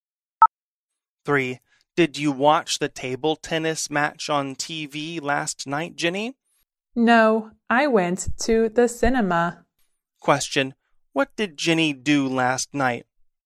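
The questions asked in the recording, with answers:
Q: What did Jenny do last night?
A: She went to the cinema.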